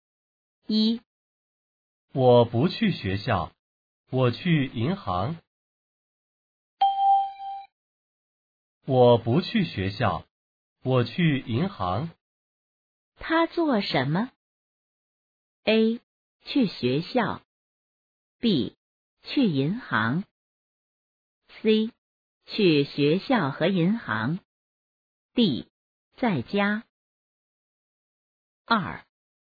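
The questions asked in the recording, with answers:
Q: 他做什么?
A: B: 去银行。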